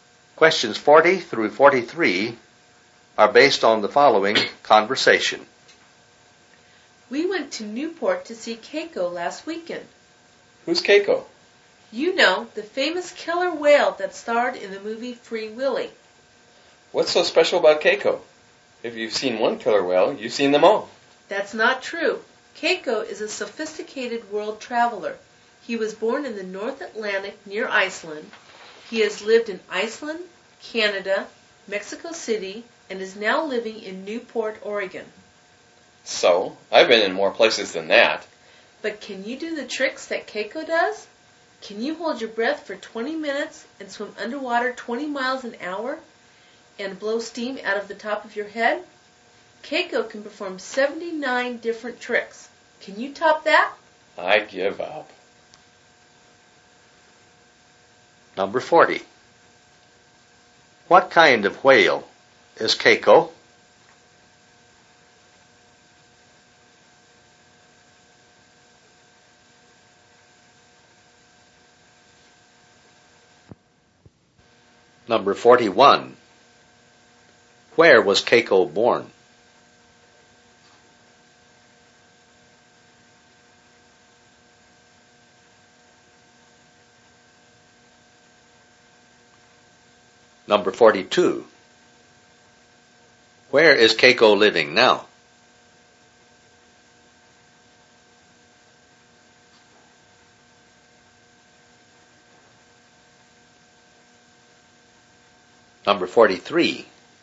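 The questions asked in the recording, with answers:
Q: What kind of whale is Keiko?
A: A killer whale

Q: Where was Keiko born?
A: In the North Atlantic near Iceland

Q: Where is Keiko living now?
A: Newport, Oregon

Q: How many distinctive behavior patterns, tricks, does Keiko know?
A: 79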